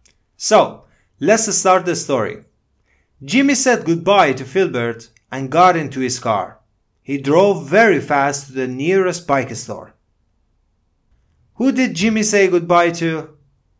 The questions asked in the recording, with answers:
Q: Who did Jimmy say goodbye to?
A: Filbert. He said goodbye to Filbert.